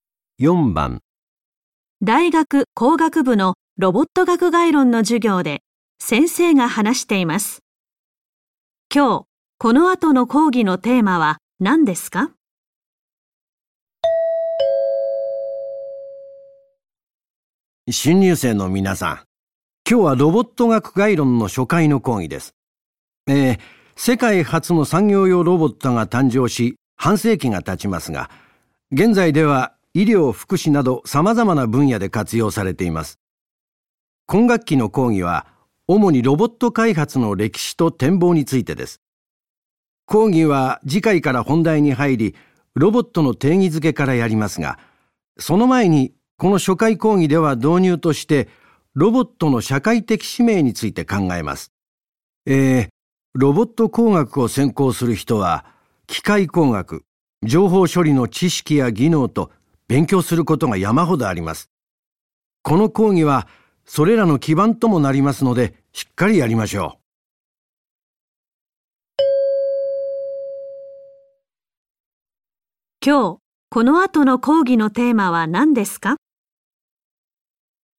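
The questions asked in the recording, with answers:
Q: 今日、この後の講義のテーマは何ですか?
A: ロボットの社会的使命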